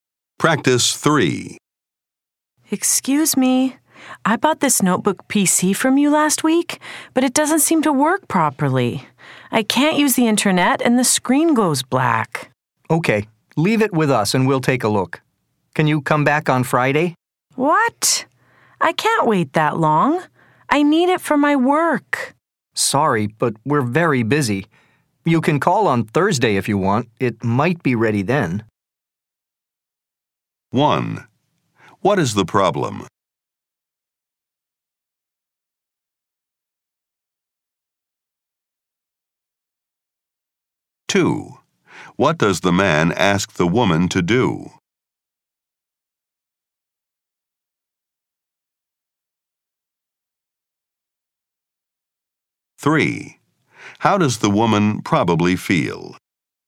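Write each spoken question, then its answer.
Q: What is the problem?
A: The notebook PC she bought doesn't work properly: she can't use the internet and the screen goes black.

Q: What does the man ask the woman to do?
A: Leave the PC with them and come back on Friday.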